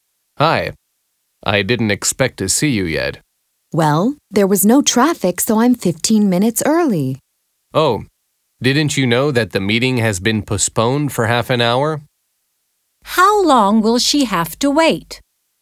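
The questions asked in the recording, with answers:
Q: How long will she have to wait?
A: 45 minutes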